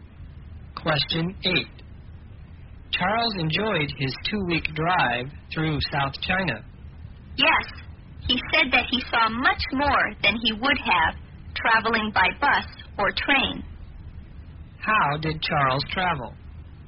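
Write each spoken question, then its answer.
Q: How did Charles travel?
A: By car (he drove).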